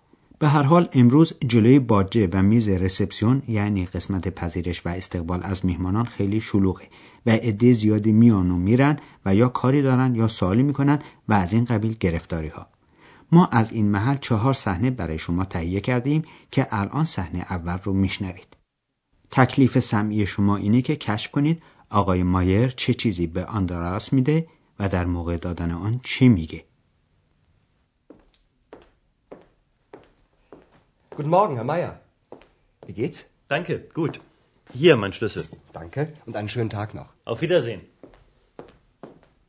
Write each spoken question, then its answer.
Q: تکلیف سمعی شما اینه که کشف کنید آقای مایر چه چیزی به آندراس میده و در موقع دادن آن چی میگه.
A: پس آقای مایر کلید اتاقش رو گذاشت روی میز و گفت بفرمایید کلید من.